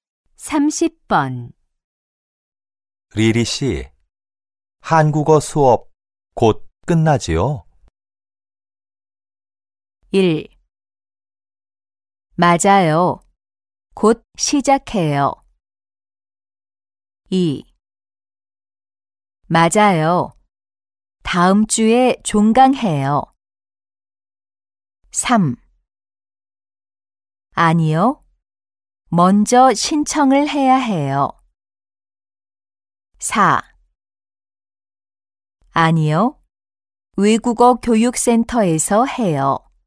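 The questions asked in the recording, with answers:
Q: 리리 씨, 한국어 수업 곧 끝나지요?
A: 2: 맞아요. 다음 주에 종강해요.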